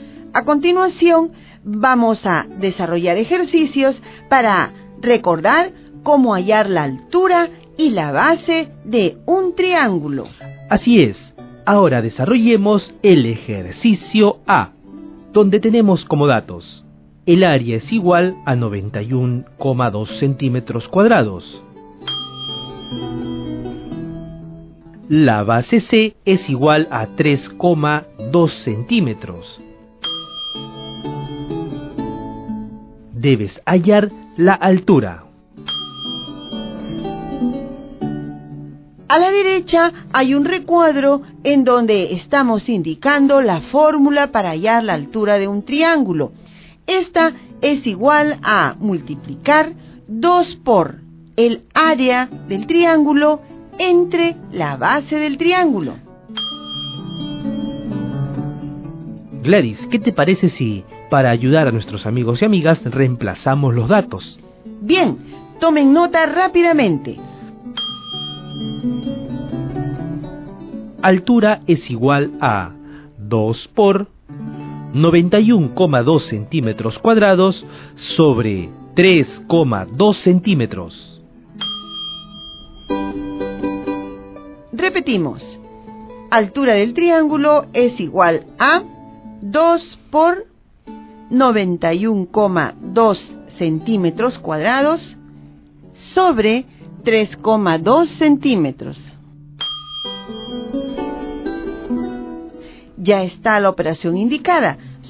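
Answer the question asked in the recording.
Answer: 57 cm (2 × 91,2 / 3,2)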